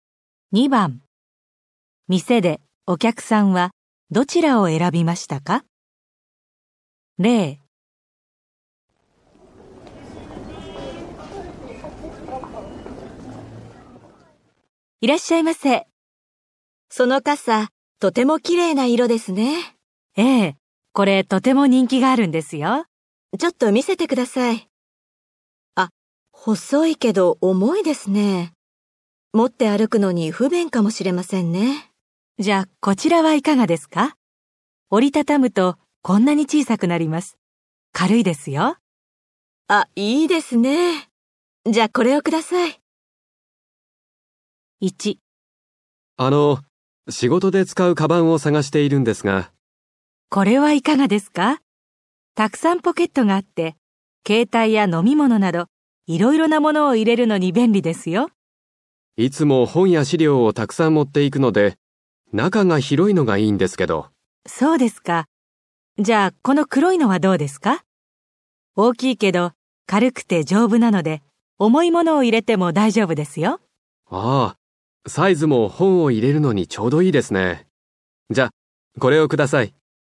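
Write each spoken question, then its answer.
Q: 店でお客さんはどちらを選びましたか?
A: 大きくて軽くて丈夫な黒いカバン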